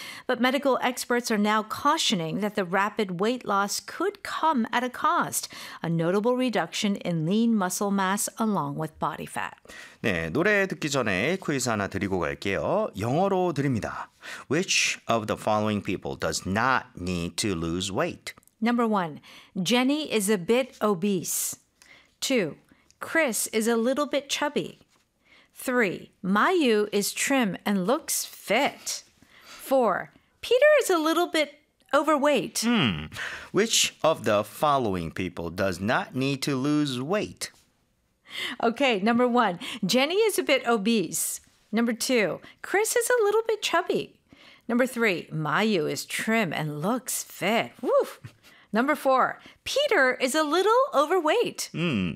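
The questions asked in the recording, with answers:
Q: Which of the following people does not need to lose weight?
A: 3: Mayu is trim and looks fit.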